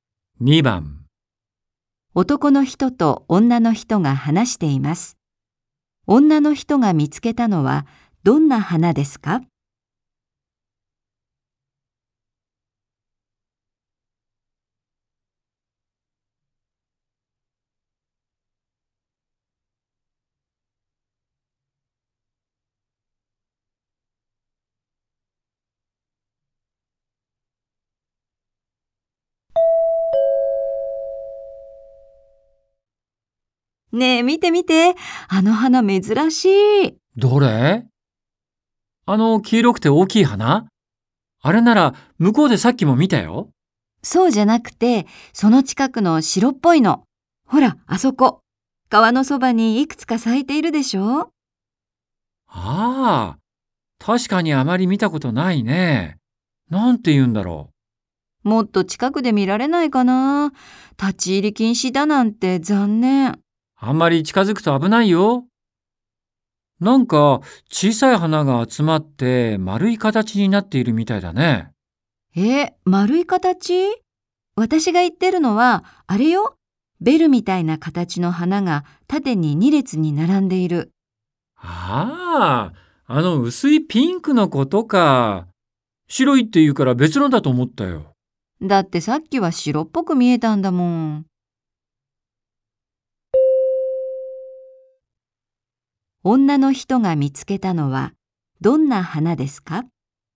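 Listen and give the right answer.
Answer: ベルのような形の小さい花が縦に2列に並んだ、薄いピンクの花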